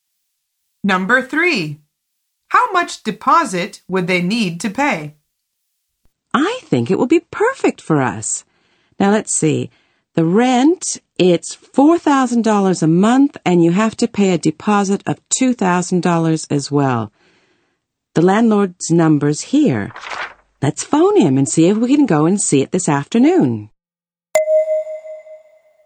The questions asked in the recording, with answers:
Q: How much deposit would they need to pay?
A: The answer is $2,000.